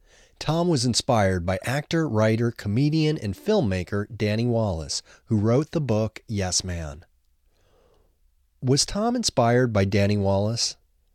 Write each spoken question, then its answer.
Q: Was Tom inspired by Danny Wallace?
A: Yes, Tom was inspired by Danny Wallace.